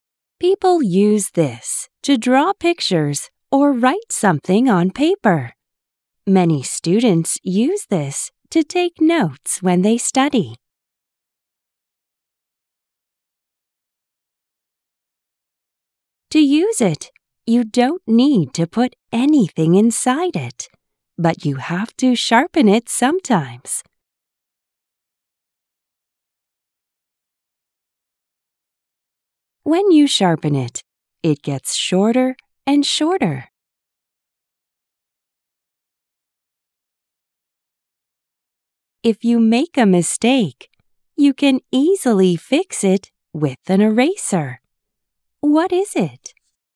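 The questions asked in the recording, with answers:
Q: What is it?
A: A pencil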